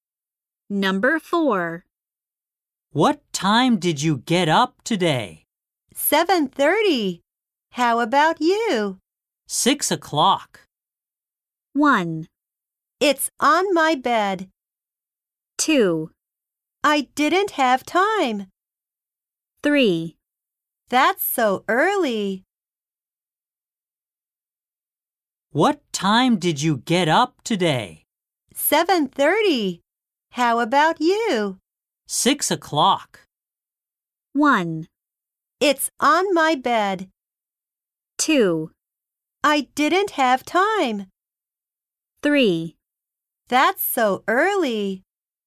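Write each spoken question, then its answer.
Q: 6 o'clock.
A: 3: That's so early.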